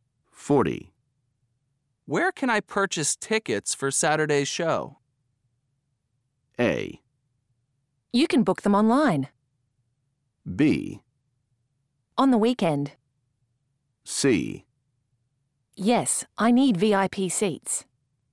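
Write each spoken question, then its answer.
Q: Where can I purchase tickets for Saturday's show?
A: A: You can book them online.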